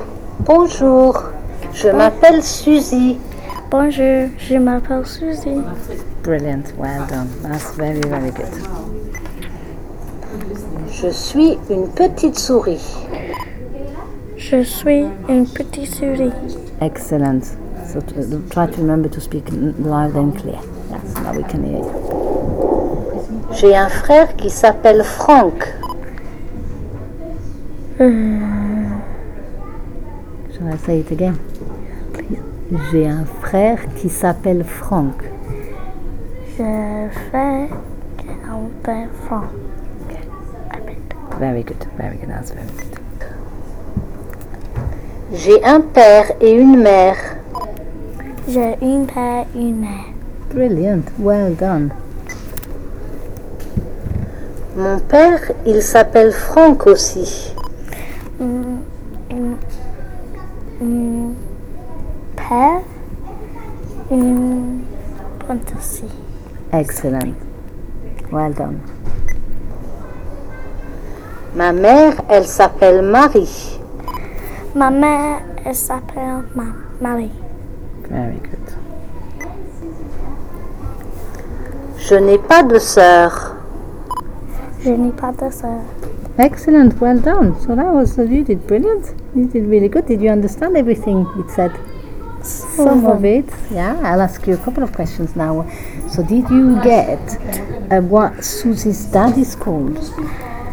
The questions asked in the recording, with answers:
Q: So did you get what Susie's dad is called?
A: It says, mon père, il s'appelle Franck aussi.